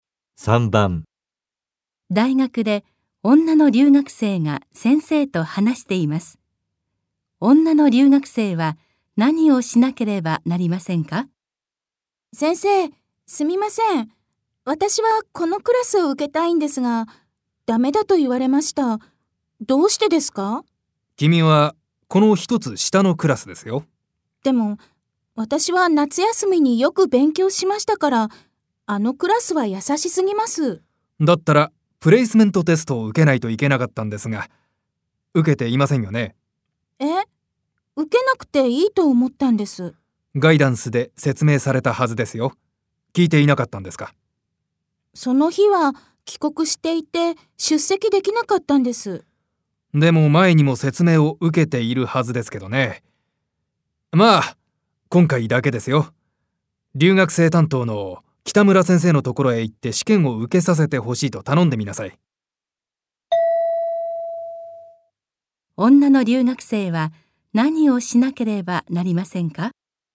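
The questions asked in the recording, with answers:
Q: 女の留学生は何をしなければなりませんか?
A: 北村先生のところへ行って、プレイスメントテストを受けさせてほしいと頼む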